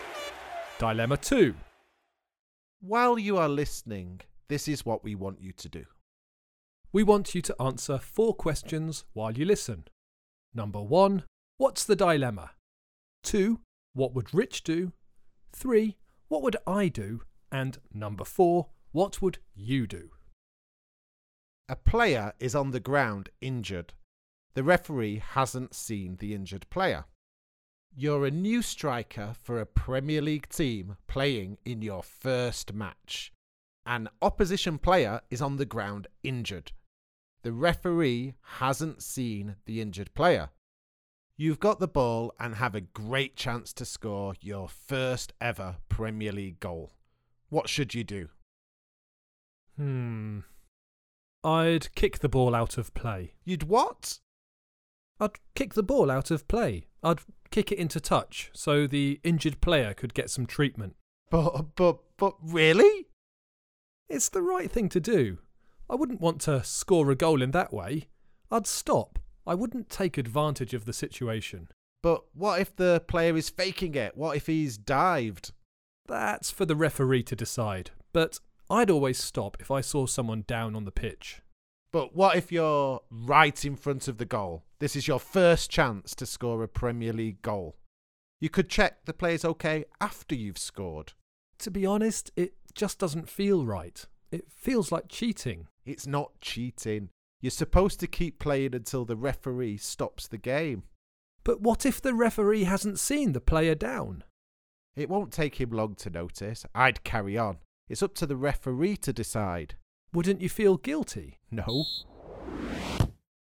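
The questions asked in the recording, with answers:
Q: what's the dilemma?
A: Whether to keep playing and score his first goal or kick the ball out so the injured opposing player can get treatment

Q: what would Rich do?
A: Carry on playing; it's up to the referee

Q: what would I do?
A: Kick the ball out of play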